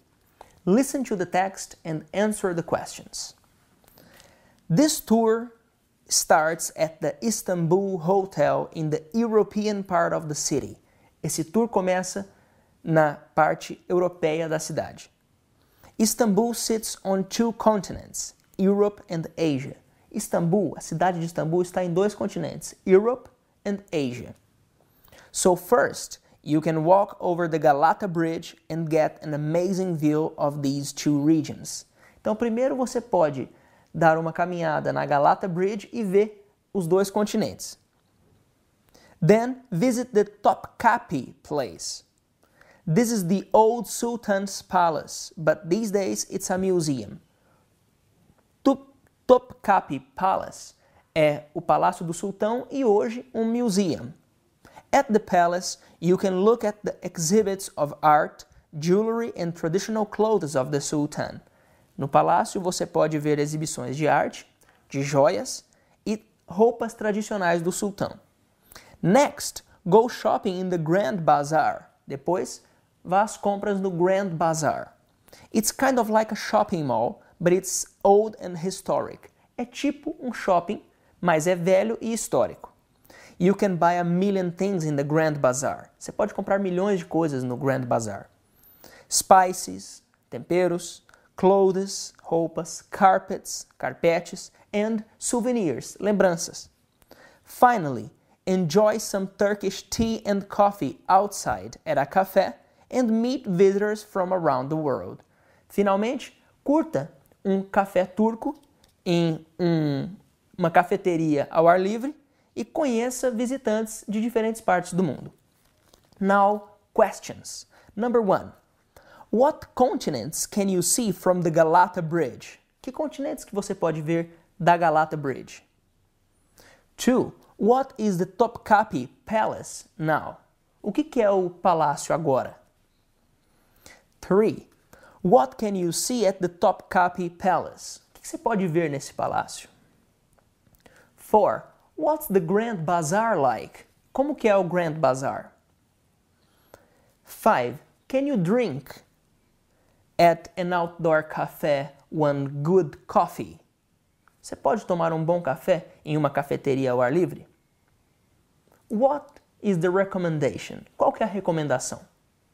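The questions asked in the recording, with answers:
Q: What continents can you see from the Galata Bridge?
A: Europe and Asia

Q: What is the Topkapi Palace now?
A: A museum

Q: What can you see at the Topkapi Palace?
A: Exhibits of art, jewelry and traditional clothes of the Sultan

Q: What's the Grand Bazaar like?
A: Like a shopping mall, but old and historic

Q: Can you drink at an outdoor café one good coffee?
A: Yes, Turkish tea and coffee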